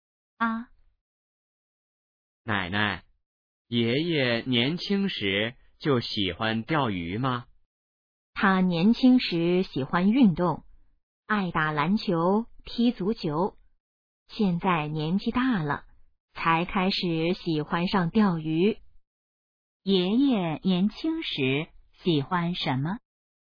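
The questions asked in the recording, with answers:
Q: 爷爷年轻时喜欢什么?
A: 运动(打篮球、踢足球)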